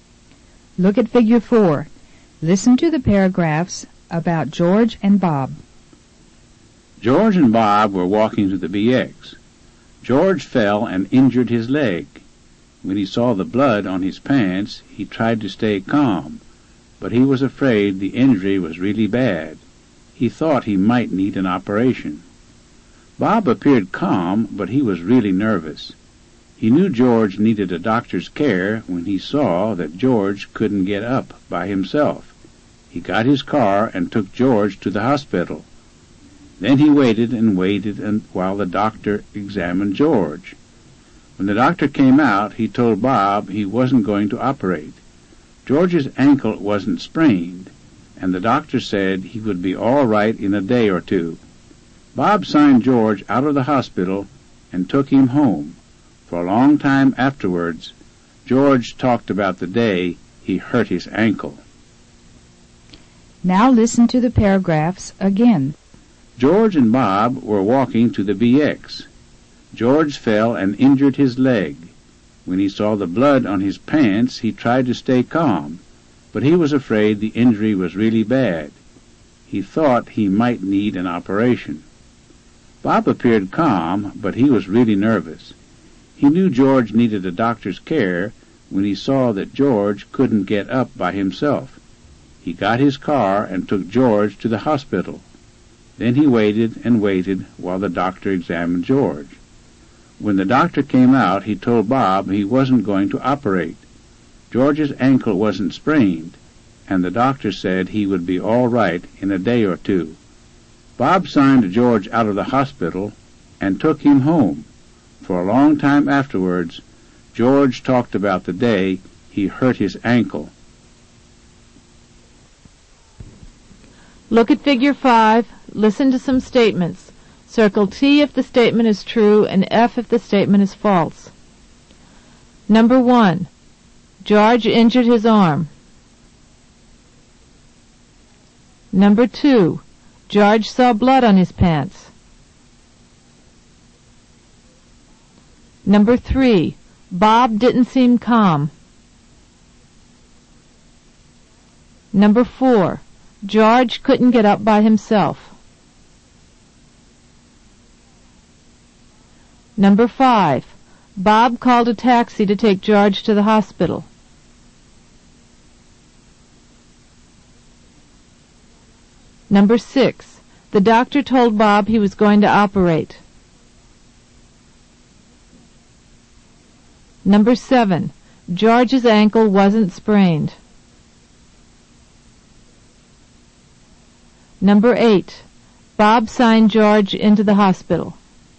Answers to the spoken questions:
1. Number 1 is false. George injured his leg, not his arm.
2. Number 2 is true. George saw blood on his pants.
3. Number 3 is false. Bob appeared calm, so he seemed calm.
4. Number 4 is true. George couldn't get up by himself.
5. Number 5 is false. Bob got his car and took George to the hospital.
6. Number 6 is false.
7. Number 7 is true. George's ankle wasn't sprained.
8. Number 8 is false. Bob signed George out of the hospital, not into it.